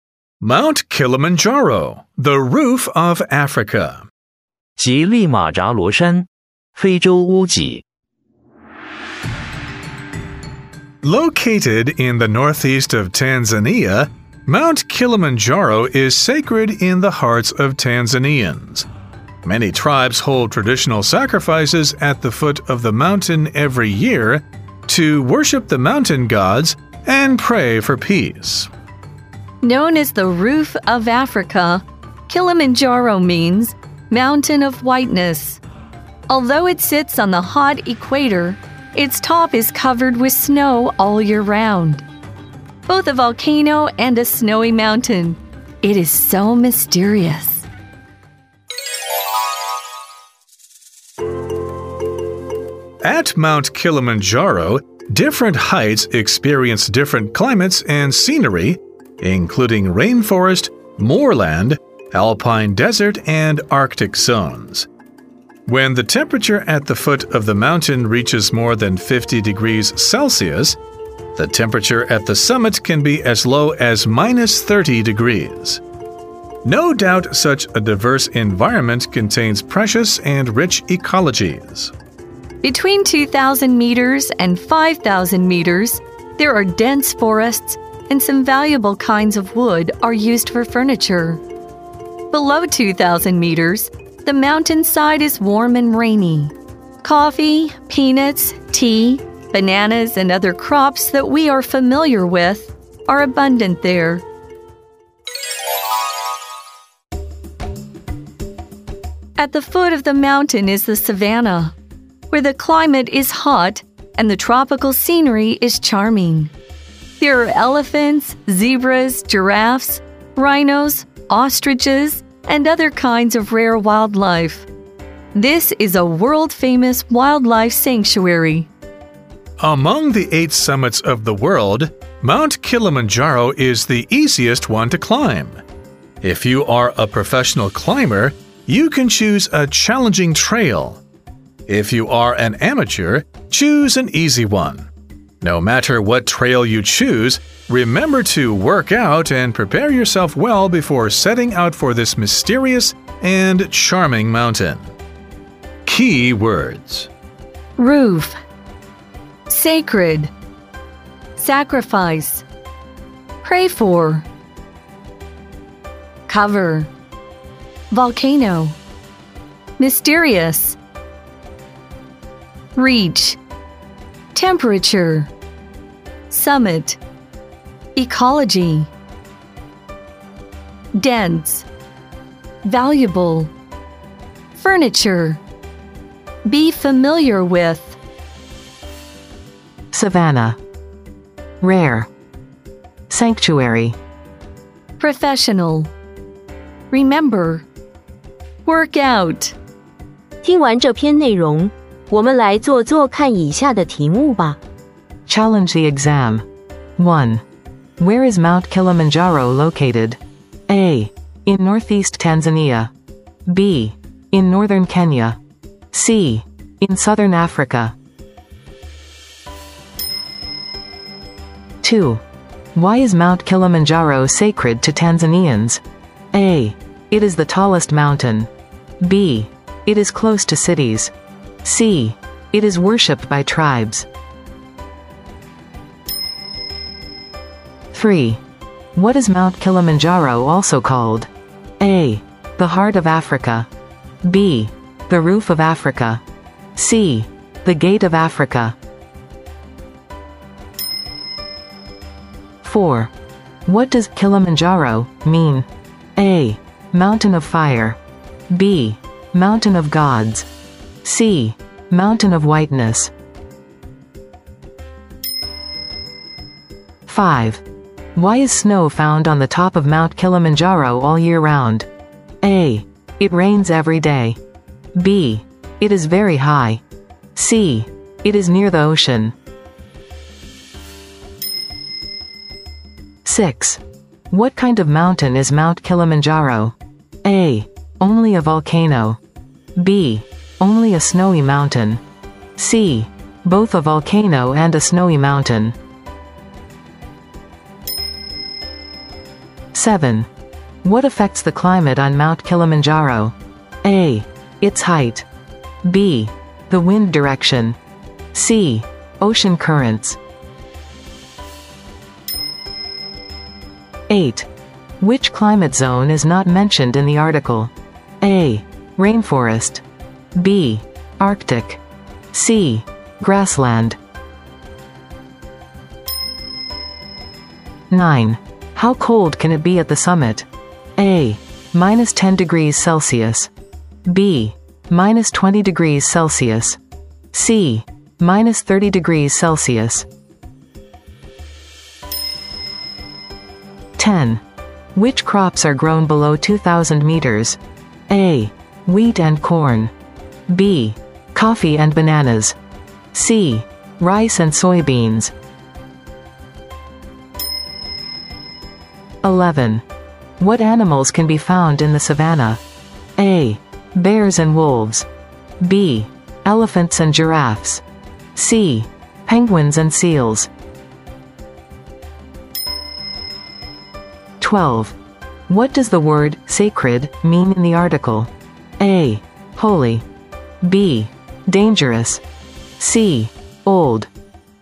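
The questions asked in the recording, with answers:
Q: Where is Mount Kilimanjaro located?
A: A: In northeast Tanzania

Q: Why is Mount Kilimanjaro sacred to Tanzanians?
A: C: It is worshipped by tribes

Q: What is Mount Kilimanjaro also called?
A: B: The Roof of Africa

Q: What does Kilimanjaro mean?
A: C: Mountain of Whiteness

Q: What kind of mountain is Mount Kilimanjaro?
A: C: Both a volcano and a snowy mountain

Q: What affects the climate on Mount Kilimanjaro?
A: A: Its height

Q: How cold can it be at the summit?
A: C: Minus 30 degrees Celsius

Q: Which crops are grown below 2,000 meters?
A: B: Coffee and bananas

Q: What animals can be found in the savanna?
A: B: Elephants and giraffes

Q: What does the word sacred mean in the article?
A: A: Holy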